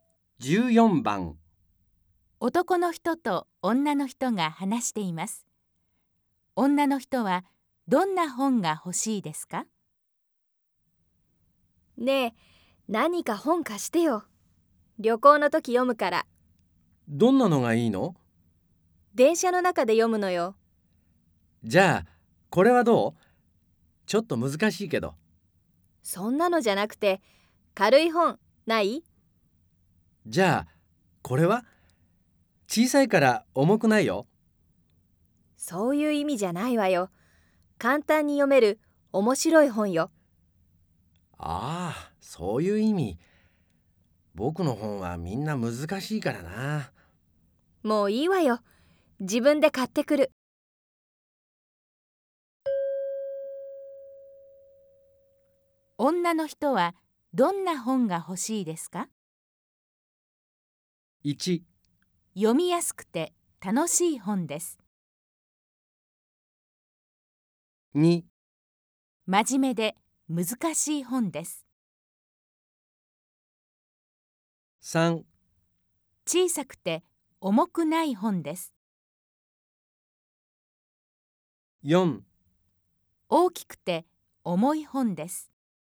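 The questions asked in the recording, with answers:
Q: 女の人はどんな本が欲しいですか?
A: 1: 読みやすくて楽しい本です。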